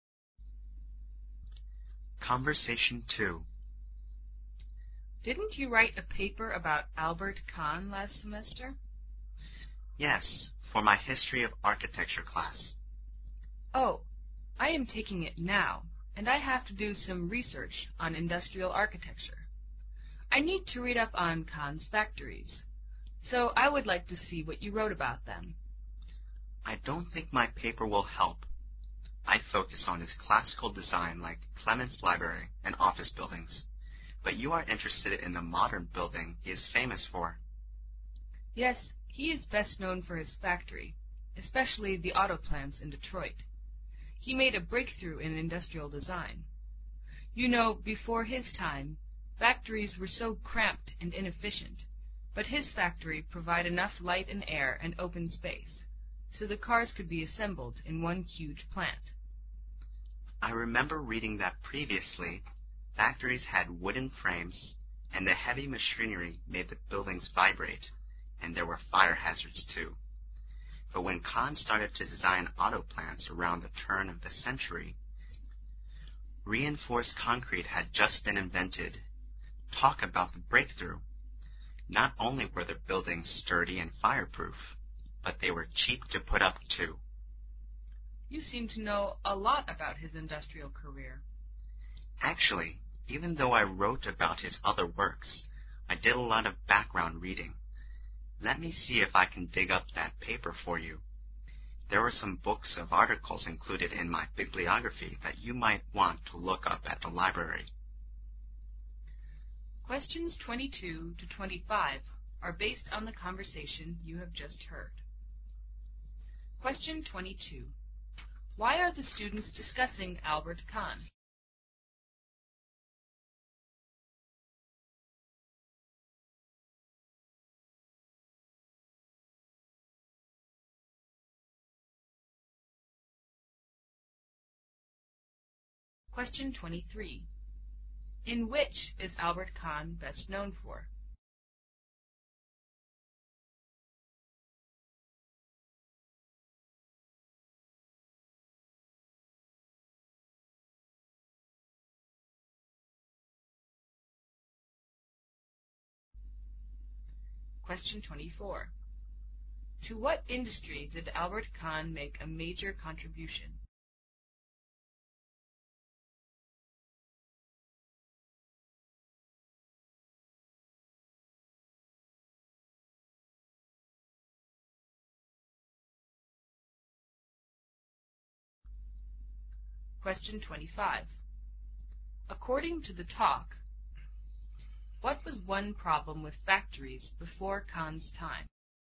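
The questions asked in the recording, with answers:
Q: In which is Albert Kahn best known for?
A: His factories.

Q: To what industry did Albert Kahn make a major contribution?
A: The auto industry.

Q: According to the talk, what was one problem with factories before Kahn's time?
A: They were cramped and had wooden frames, so they shook under heavy machinery and were fire hazards.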